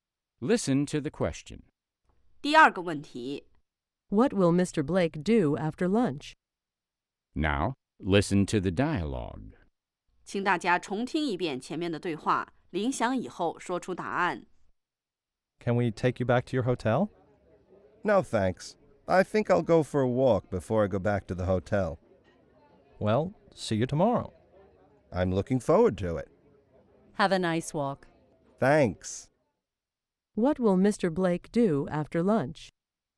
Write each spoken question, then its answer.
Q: What will Mr. Blake do after lunch?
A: He'll go for a walk.